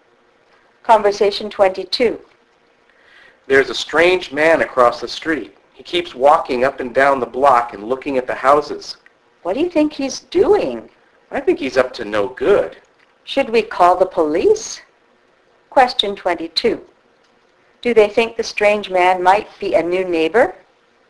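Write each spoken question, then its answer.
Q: Do they think the strange man might be a new neighbor?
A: No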